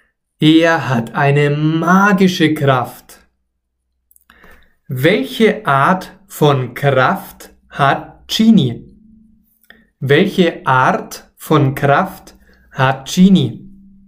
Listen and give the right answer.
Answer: eine magische. Er hat eine magische Kraft, eine Zauberkraft.